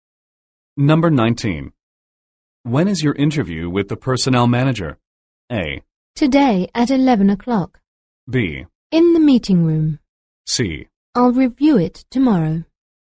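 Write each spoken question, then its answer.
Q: When is your interview with the personnel manager?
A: A: Today at 11 o'clock.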